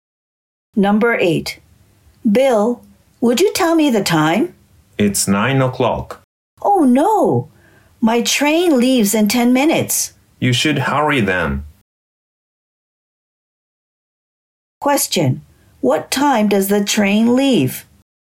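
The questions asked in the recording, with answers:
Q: What time does the train leave?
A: At 9:10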